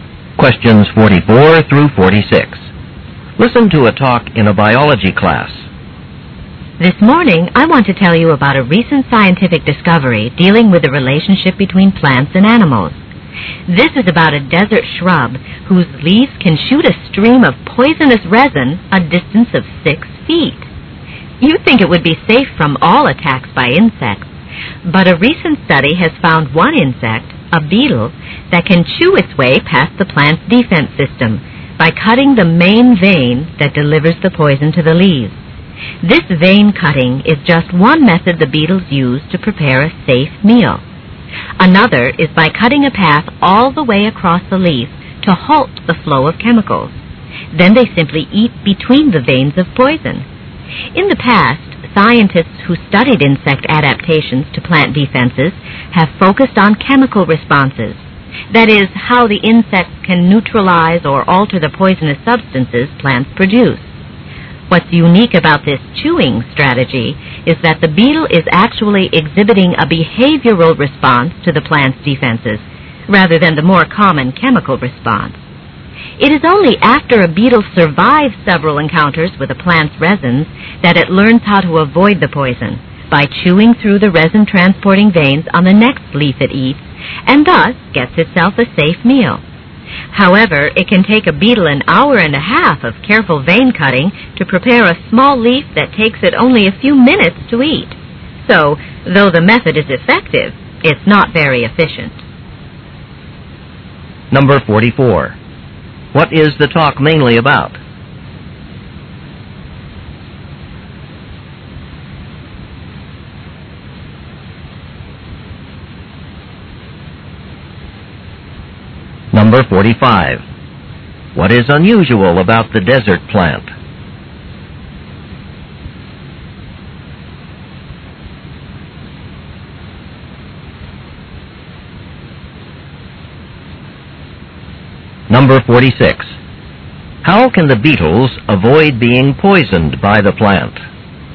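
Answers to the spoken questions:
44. How a beetle avoids the poison defense of a desert shrub
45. Its leaves can shoot poisonous resin six feet
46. By cutting the veins that carry the poison to the leaves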